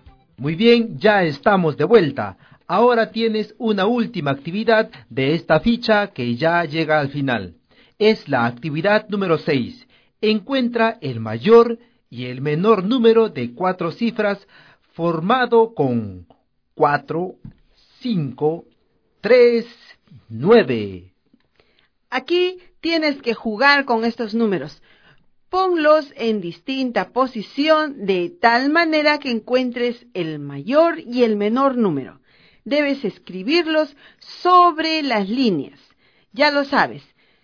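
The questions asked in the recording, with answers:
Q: Encuentra el mayor y el menor número de 4 cifras formado con 4, 5, 3, 9.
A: Mayor: 9543; menor: 3459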